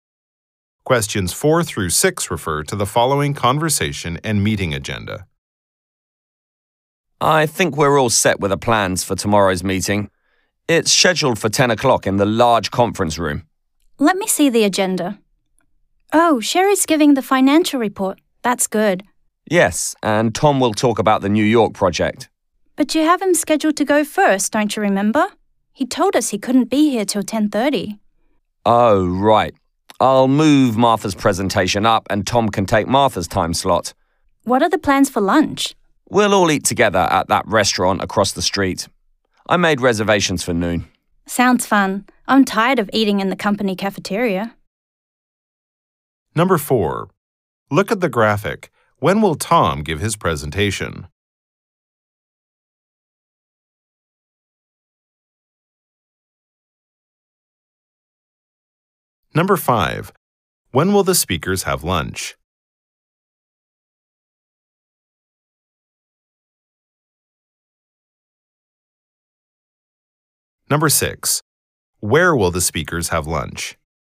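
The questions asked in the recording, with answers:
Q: When will the speakers have lunch?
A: At noon

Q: Where will the speakers have lunch?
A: At the restaurant across the street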